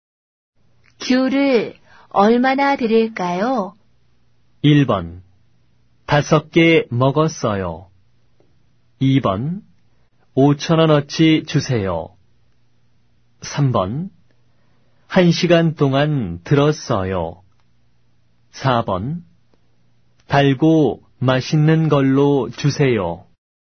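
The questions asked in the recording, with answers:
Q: 귤을 얼마나 드릴까요?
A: 2: 5천 원어치 주세요.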